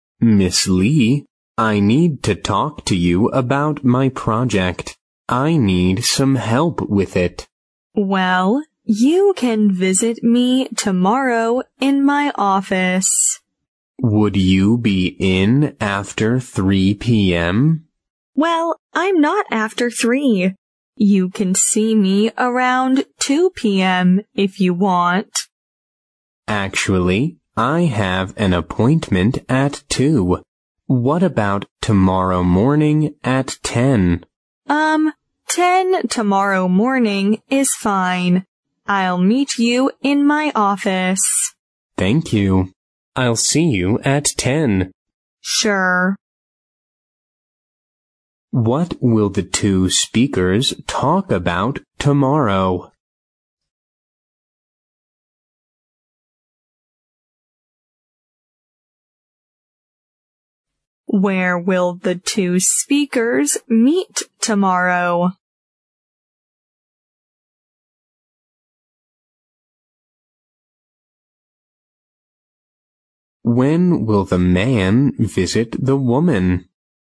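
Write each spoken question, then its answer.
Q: What will the two speakers talk about tomorrow?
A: The man's project

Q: Where will the two speakers meet tomorrow?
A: In the woman's office

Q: When will the man visit the woman?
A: Tomorrow morning at 10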